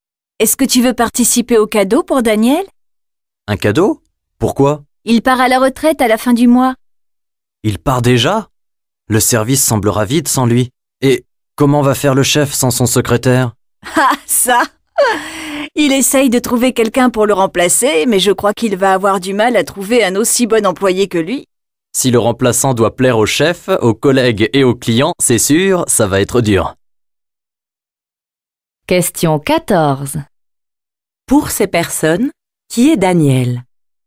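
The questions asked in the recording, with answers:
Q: Pour ces personnes, qui est Daniel ?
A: Un collègue, le secrétaire du chef, qui part à la retraite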